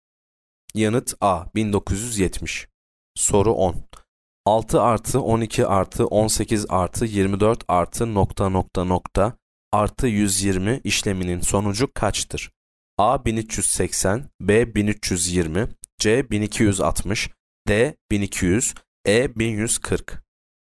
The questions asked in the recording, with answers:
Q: 6 artı 12 artı 18 artı 24 artı nokta nokta nokta artı 120 işleminin sonucu kaçtır?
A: Yanıt C 1260.